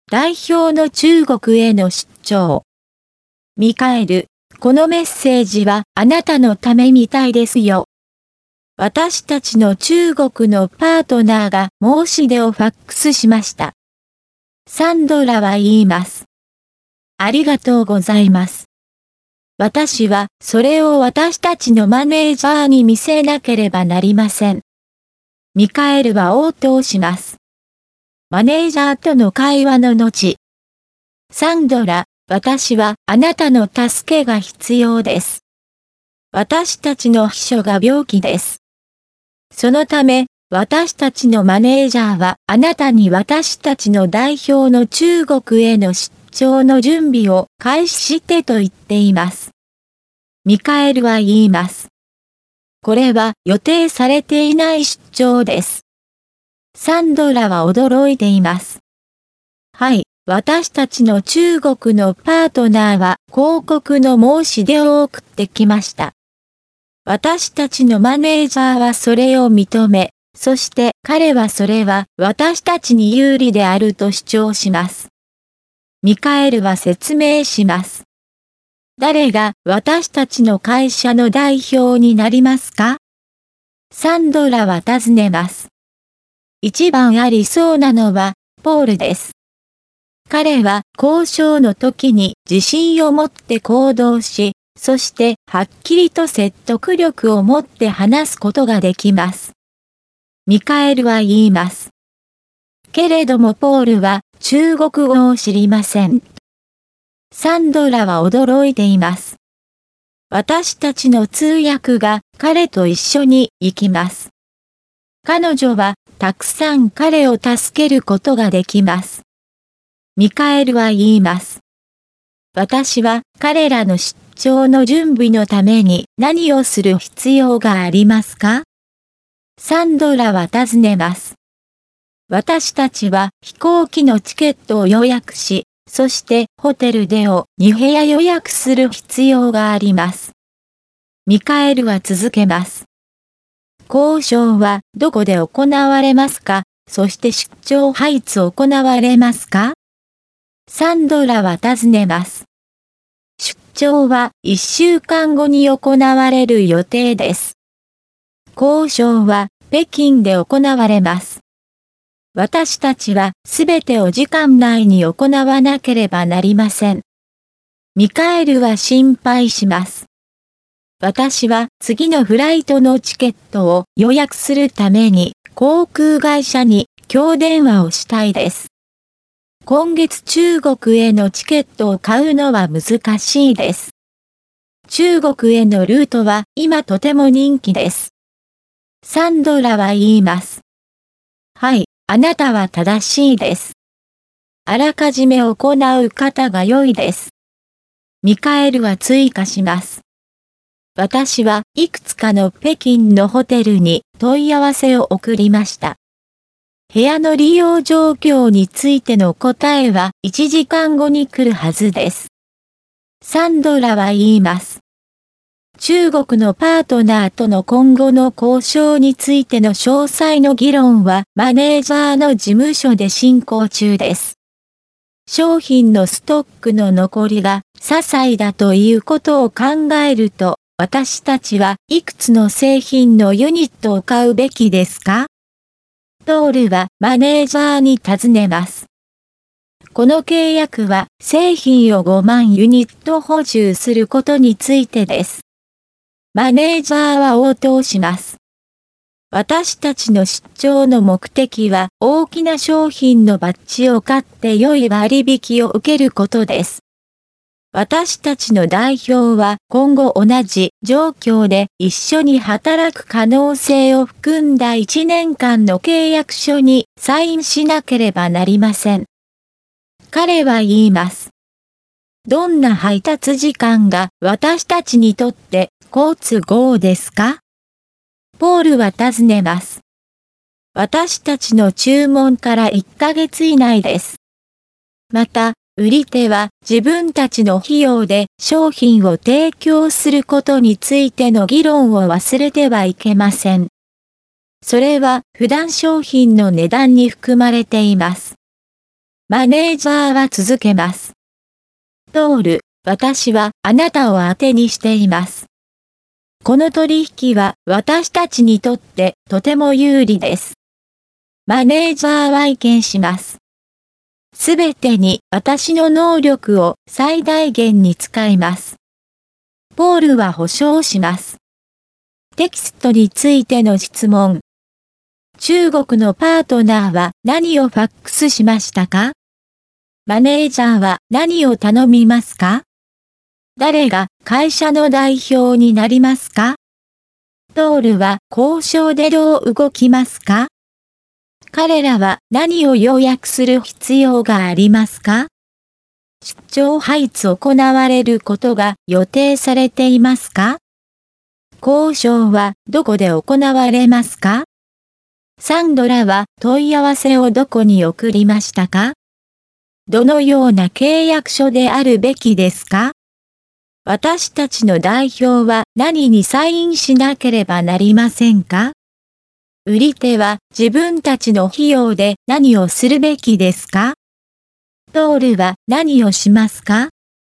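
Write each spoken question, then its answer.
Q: 中国のパートナーは何をファックスしましたか?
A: 広告の申し出

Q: マネージャーは何を頼みますか?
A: 代表の中国への出張の準備を開始すること

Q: 誰が会社の代表になりますか?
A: ポール

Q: トールは交渉でどう動きますか?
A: 自信を持って行動し、はっきりと説得力を持って話す

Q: 出張配置行われることが予定されていますか?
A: 1週間後

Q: 交渉はどこで行われますか?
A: 北京

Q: サンドラは問い合わせをどこに送りましたか?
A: いくつかの北京のホテル

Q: 私たちの代表は何にサインしなければなりませんか?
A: 1年間の契約書

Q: 売り手は自分たちの費用で何をするべきですか?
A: 商品を提供する(配達する)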